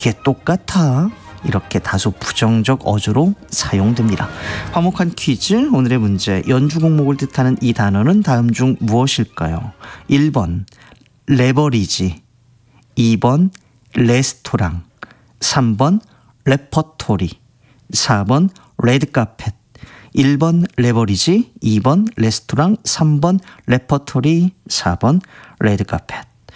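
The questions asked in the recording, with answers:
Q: 연주곡목을 뜻하는 이 단어는 다음 중 무엇일까요?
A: 3: 레퍼토리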